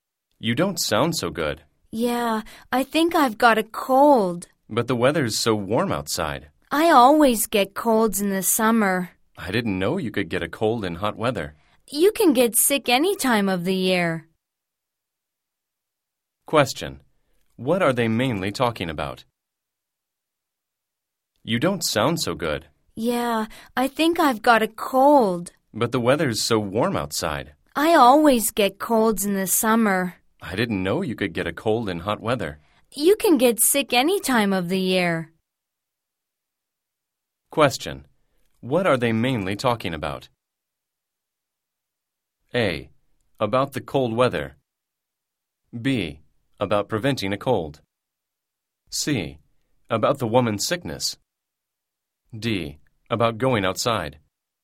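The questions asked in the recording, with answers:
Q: What are they mainly talking about?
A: C: About the woman's sickness.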